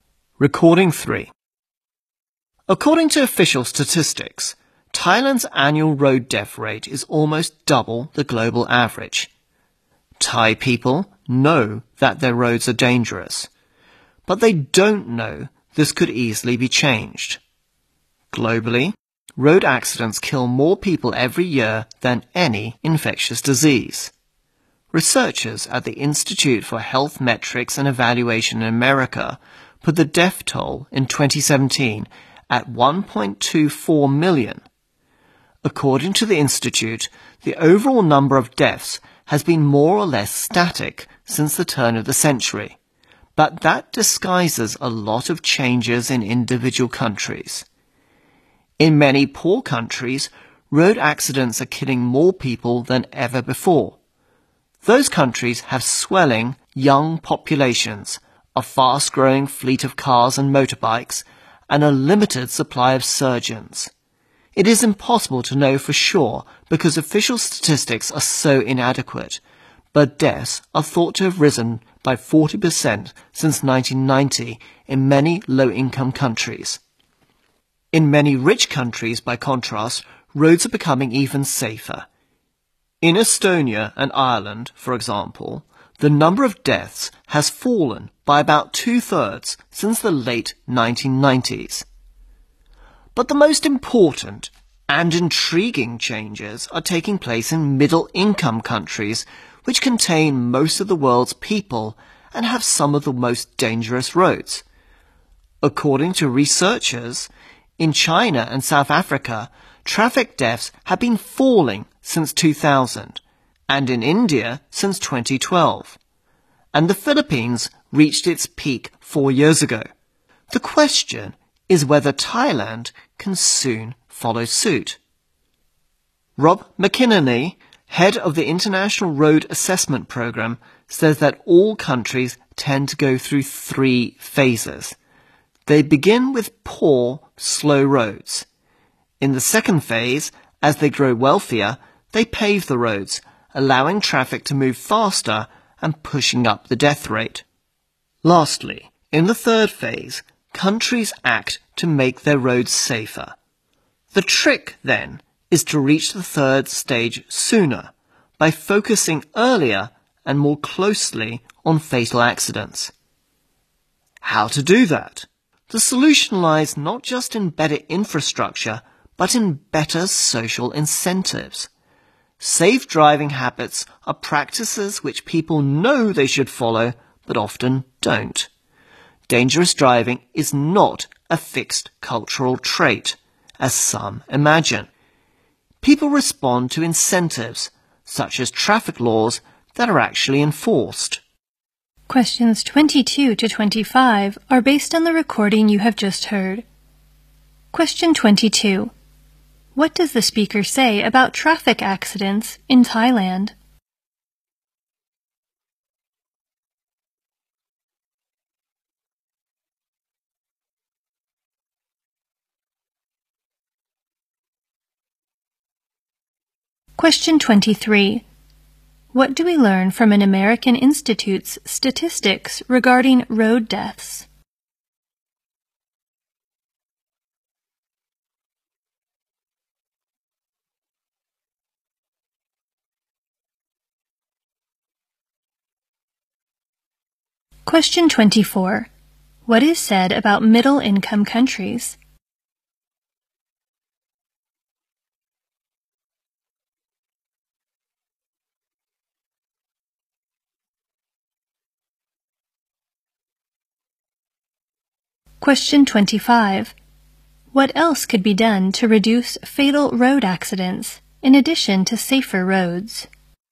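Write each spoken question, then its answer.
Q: What does the speaker say about traffic accidents in Thailand?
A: Its road death rate is almost double the global average, and this could easily be changed

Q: What do we learn from an American Institute's statistics regarding road deaths?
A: The overall number has stayed roughly the same since 2000, which hides changes in individual countries

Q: What is said about middle-income countries?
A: They hold most of the world's people, have some of the most dangerous roads, and are seeing the most important changes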